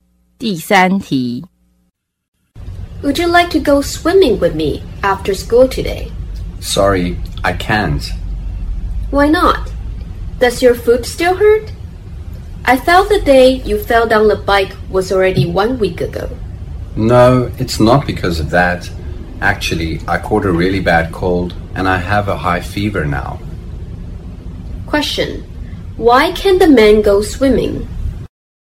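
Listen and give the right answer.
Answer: He caught a bad cold and has a high fever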